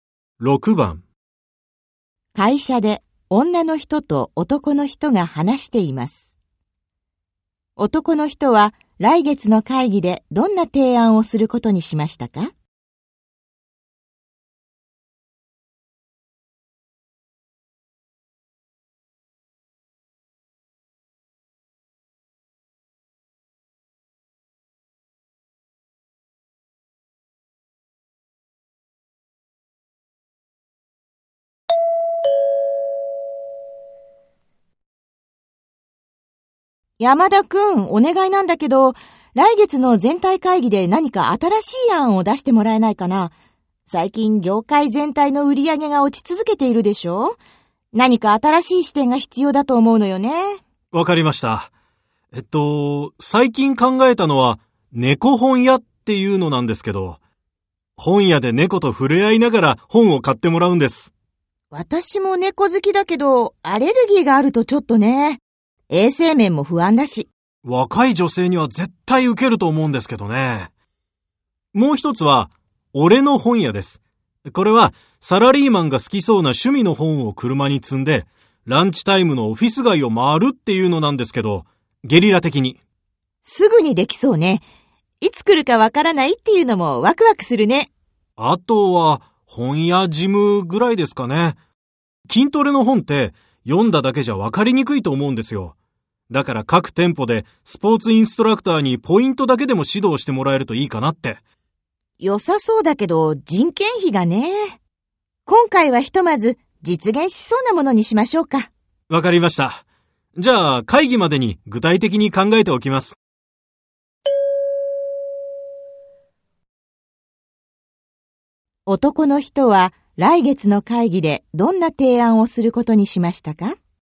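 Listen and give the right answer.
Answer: 「俺の本屋」:会社員が好きそうな趣味の本を車に積んで、ランチタイムにオフィス街を回る案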